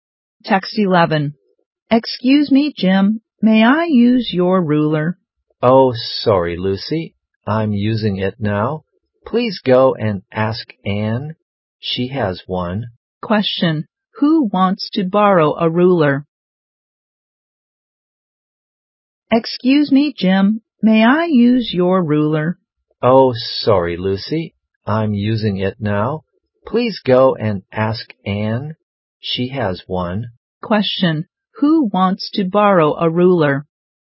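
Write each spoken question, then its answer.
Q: Who wants to borrow a ruler?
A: Lucy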